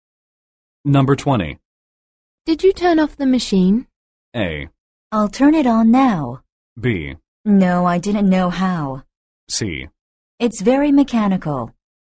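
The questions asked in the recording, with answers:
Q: Did you turn off the machine?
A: B: No, I didn't know how.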